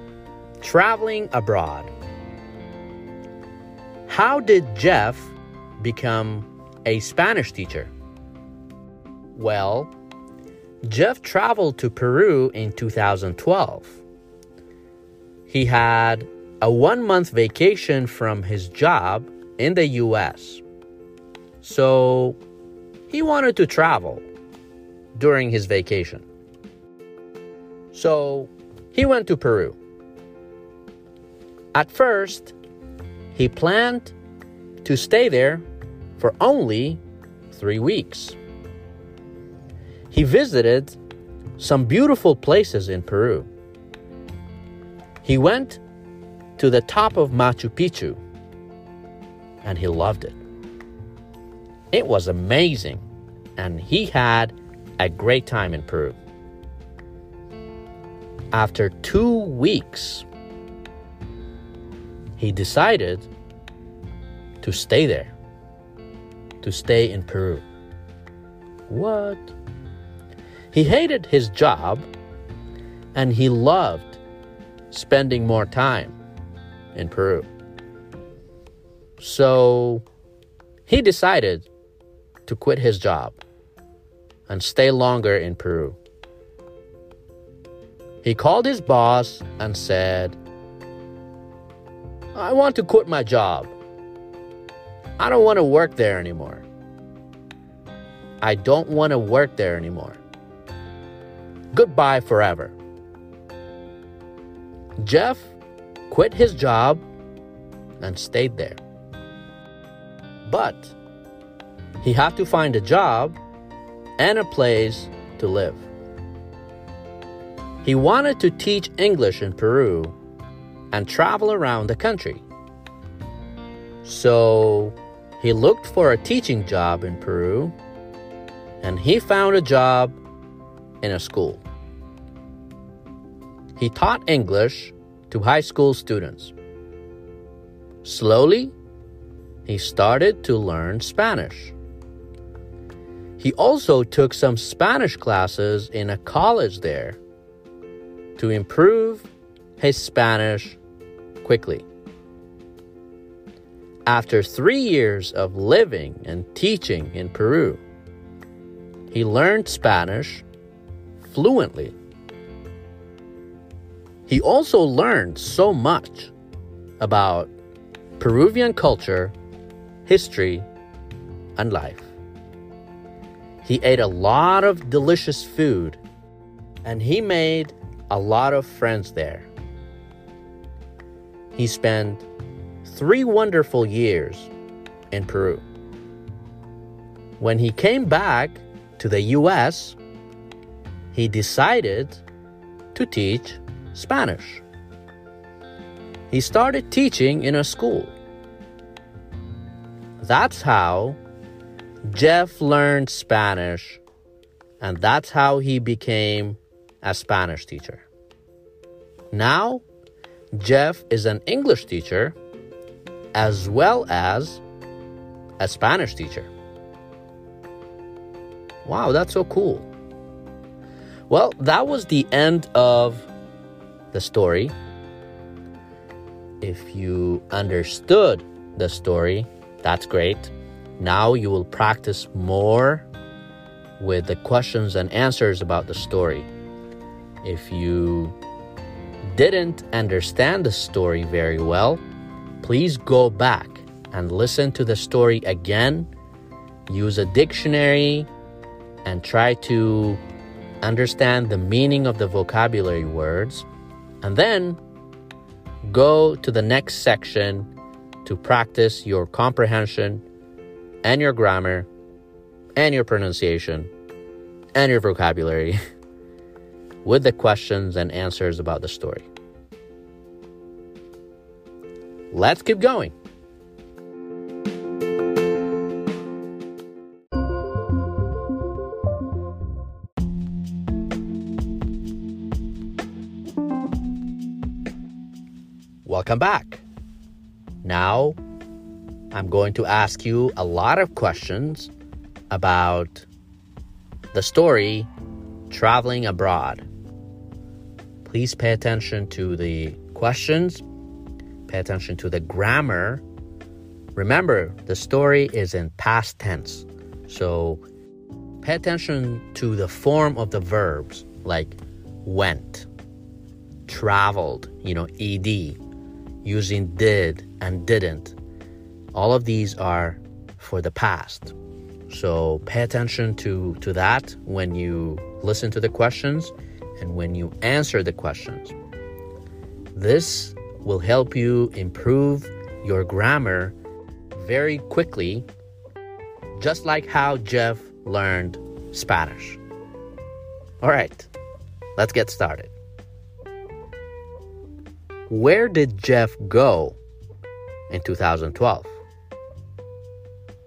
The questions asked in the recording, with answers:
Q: Where did Jeff go in 2012?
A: That's right. He went to Peru.